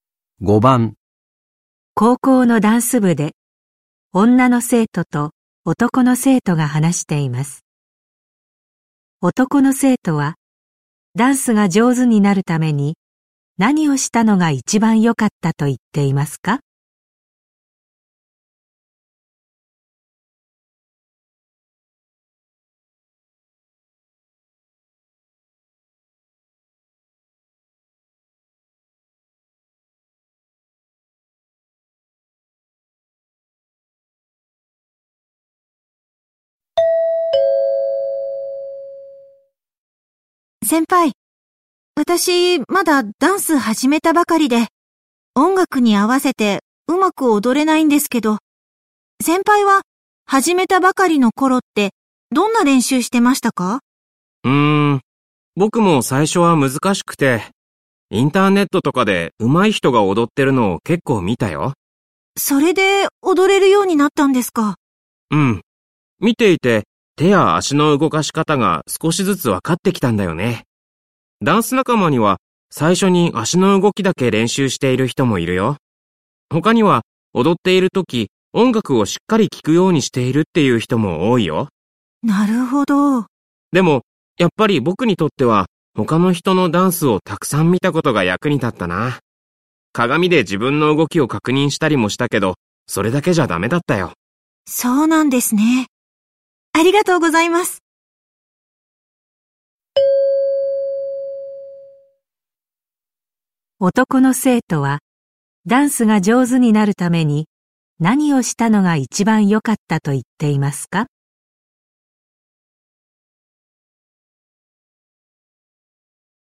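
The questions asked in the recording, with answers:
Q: 男の生徒はダンスが上手になるために何をしたのが一番良かったと言っていますか?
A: 他の人のダンスをたくさん見たこと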